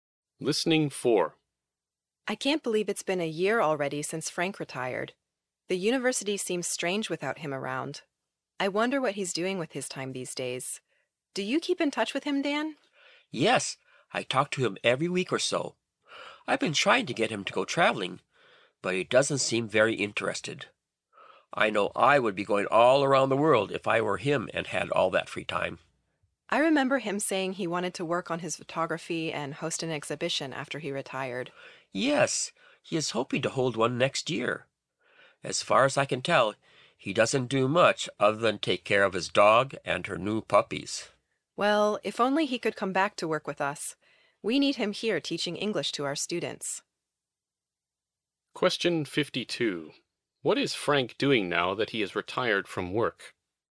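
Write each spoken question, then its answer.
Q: What is Frank doing now that he has retired from work?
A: Taking care of his dog and her puppies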